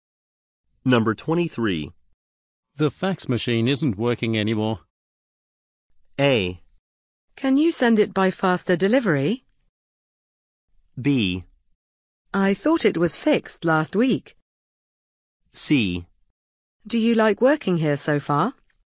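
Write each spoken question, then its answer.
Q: The fax machine isn't working anymore.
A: B: I thought it was fixed last week.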